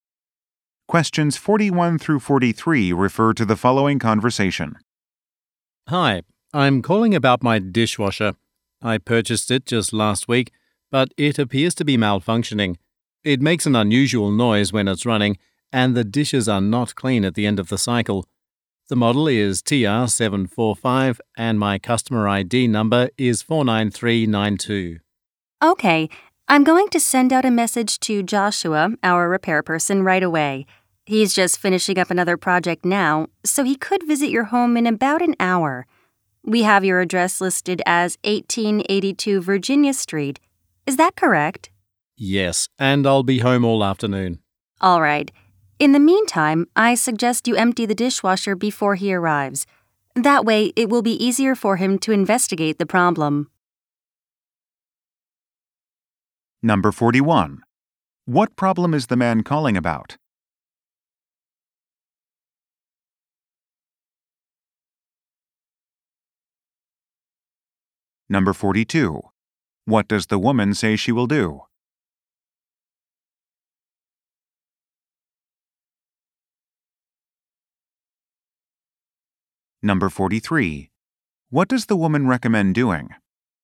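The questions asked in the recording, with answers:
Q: What problem is the man calling about?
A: His new dishwasher is malfunctioning

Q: What does the woman say she will do?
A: Send a repair person

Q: What does the woman recommend doing?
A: Emptying the dishwasher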